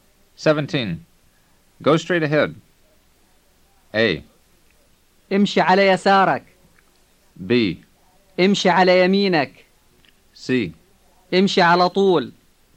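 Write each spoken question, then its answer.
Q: Go straight ahead.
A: C: امشي على طول.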